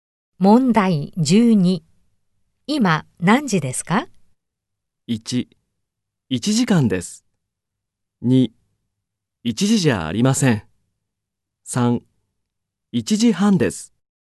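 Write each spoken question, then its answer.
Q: 今何時ですか?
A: 1: 1時半です。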